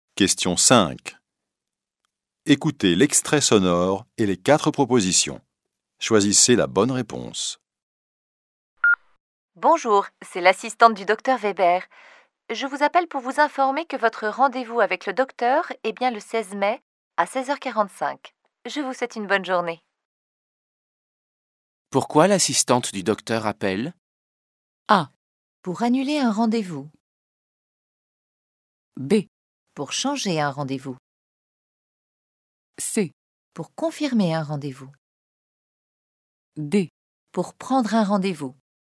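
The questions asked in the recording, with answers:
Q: Pourquoi l'assistante du docteur appelle ?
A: C: Pour confirmer un rendez-vous.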